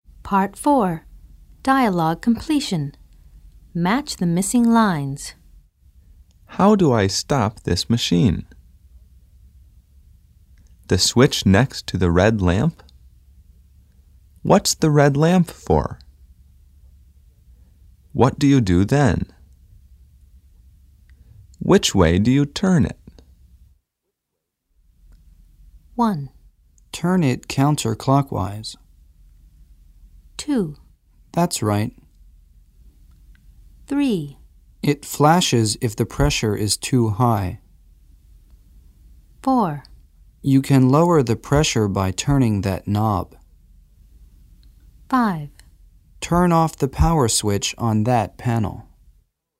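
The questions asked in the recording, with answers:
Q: How do I stop this machine?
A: 5: Turn off the power switch on that panel.

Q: The switch next to the red lamp?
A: 2: That's right.

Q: What's the red lamp for?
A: 3: It flashes if the pressure is too high.

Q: What do you do then?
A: 4: You can lower the pressure by turning that knob.

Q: Which way do you turn it?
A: 1: Turn it counterclockwise.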